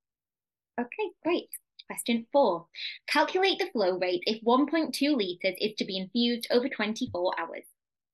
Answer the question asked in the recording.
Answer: that will give you 50 mils per hour